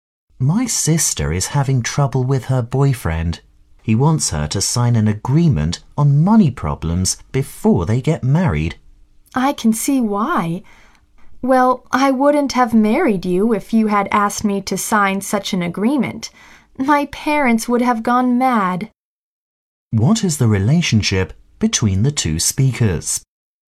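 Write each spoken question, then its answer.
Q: What is the relationship between the two speakers?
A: Husband and wife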